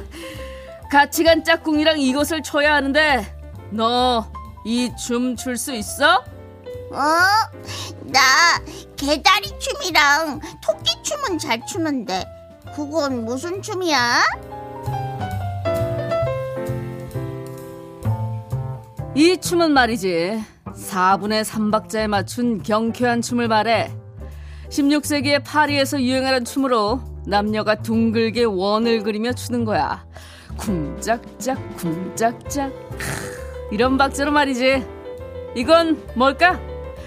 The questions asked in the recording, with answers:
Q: 쿵짝짝 쿵짝짝 이런 박자로 말이지 이건 뭘까?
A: 왈츠입니다.